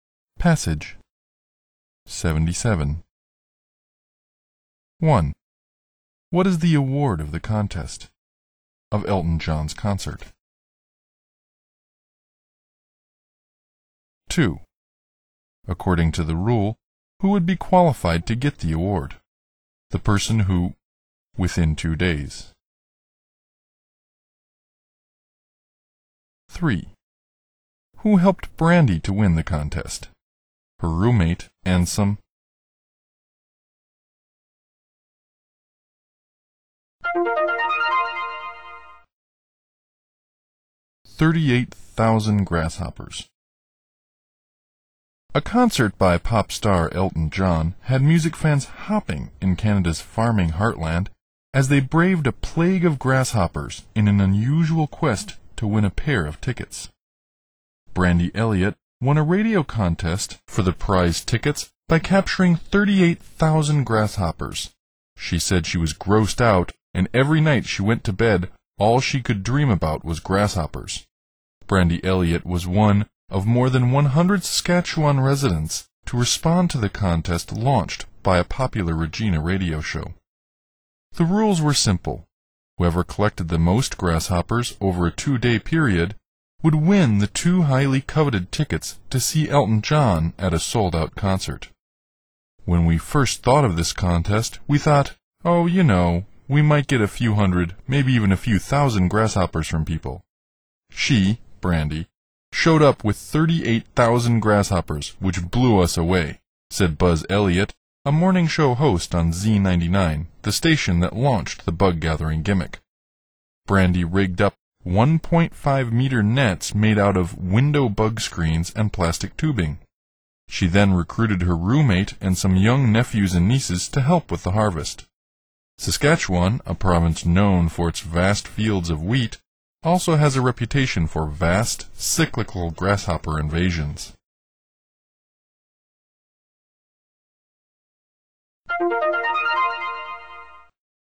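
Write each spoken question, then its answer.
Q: According to the rule, who would be qualified to get the award?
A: The person who collected the most grasshoppers within 2 days

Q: Who helped Brandy to win the contest?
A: Her roommate and some young nephews and nieces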